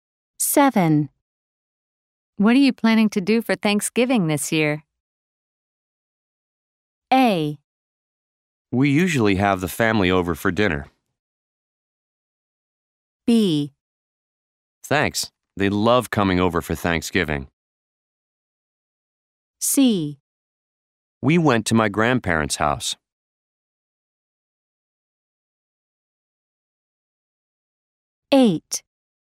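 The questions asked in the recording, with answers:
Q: What are you planning to do for Thanksgiving this year?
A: A: We usually have the family over for dinner.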